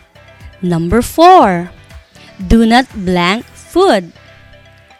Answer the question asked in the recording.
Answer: The correct answer is overcook.